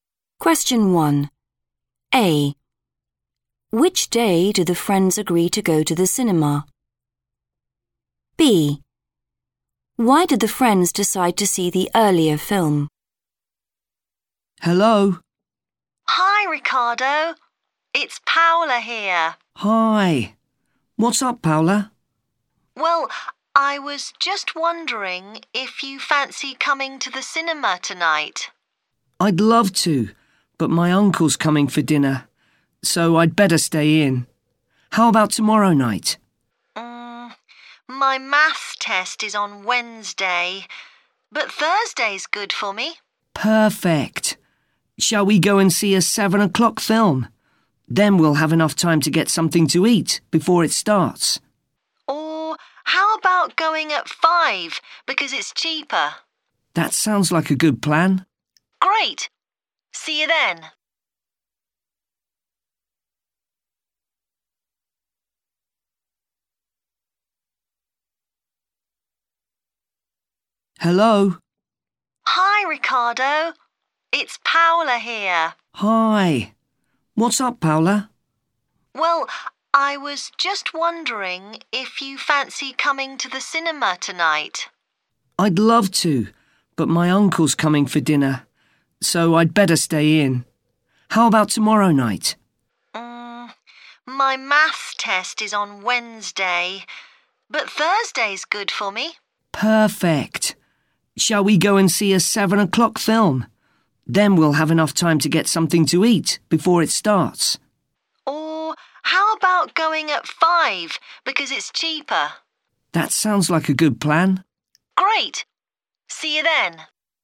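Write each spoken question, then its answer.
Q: Which day do the friends agree to go to the cinema?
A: Thursday

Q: Why did the friends decide to see the earlier film?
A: It's cheaper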